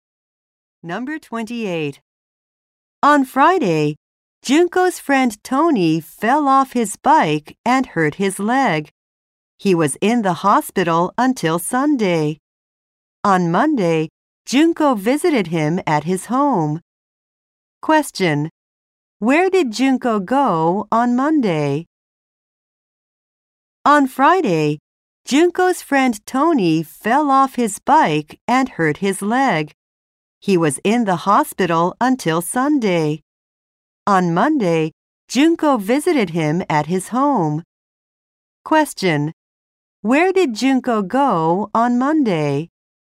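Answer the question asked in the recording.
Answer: To Tony's home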